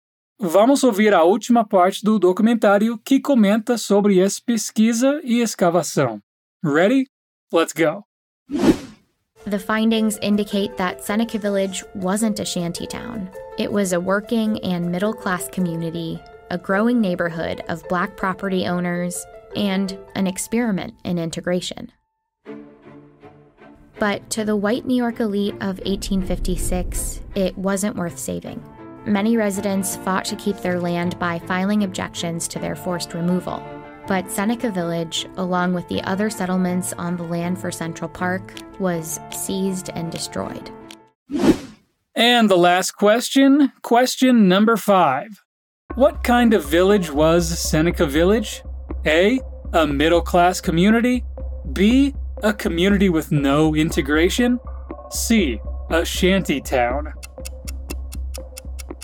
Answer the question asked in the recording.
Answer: And the answer to our last question is A.